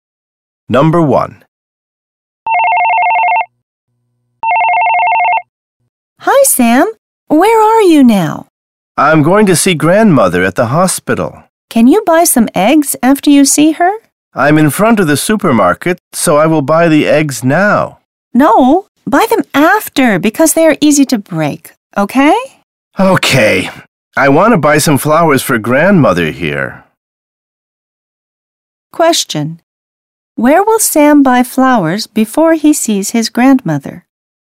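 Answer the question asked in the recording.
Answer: At the supermarket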